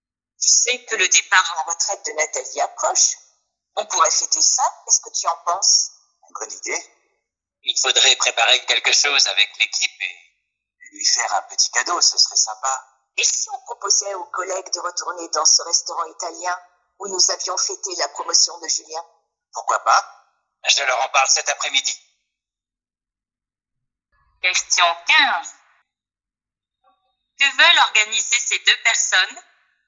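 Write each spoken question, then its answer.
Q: Que veulent organiser ces deux personnes?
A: Une fête (un repas au restaurant italien) pour le départ à la retraite de Nathalie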